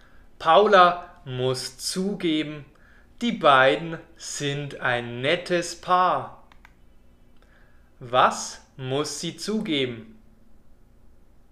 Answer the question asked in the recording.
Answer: dass die beiden ein nettes Paar sind.